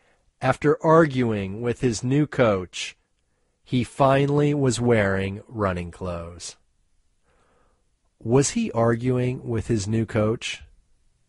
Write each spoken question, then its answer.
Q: Was he arguing with his new coach?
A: Yes, he was arguing with his new coach.